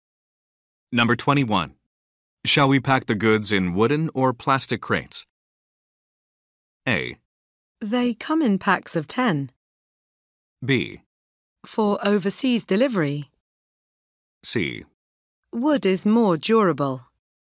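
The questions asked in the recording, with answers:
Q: Shall we pack the goods in wooden or plastic crates?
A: C: Wood is more durable.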